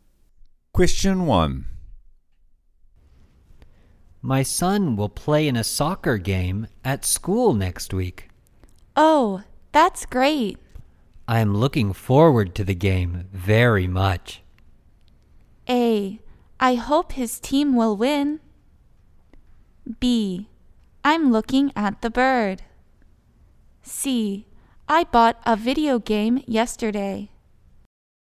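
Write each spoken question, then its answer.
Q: I am looking forward to the game very much.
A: A: I hope his team will win.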